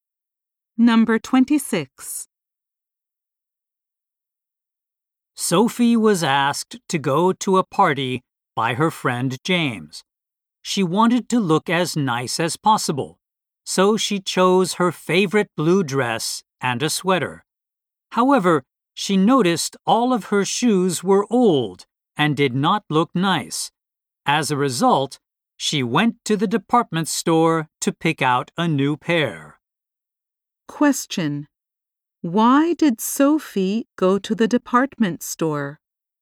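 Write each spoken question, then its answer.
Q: Why did Sophie go to the department store?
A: To buy new shoes because hers were old.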